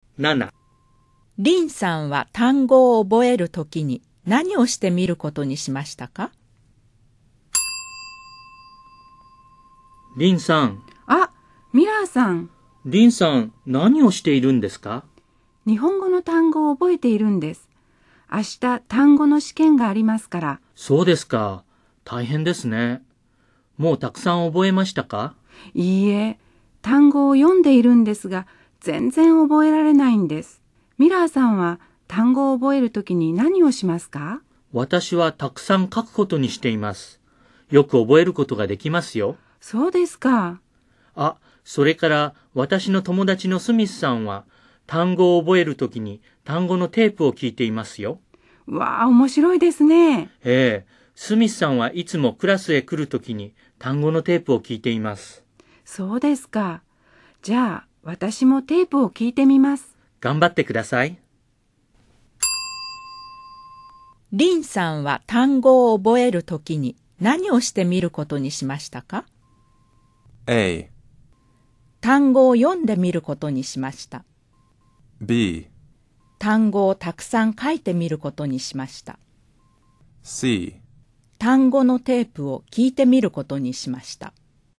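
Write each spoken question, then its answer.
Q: リンさんは単語を覚えるときに何をしてみることにしましたか?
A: C: 単語のテープを聞いてみることにしました。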